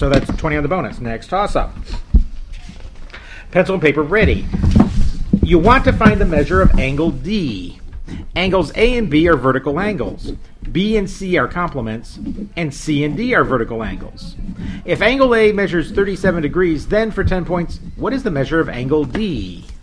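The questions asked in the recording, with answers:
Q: If angle A measures 37 degrees, then for 10 points, what is the measure of angle D?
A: 53 degrees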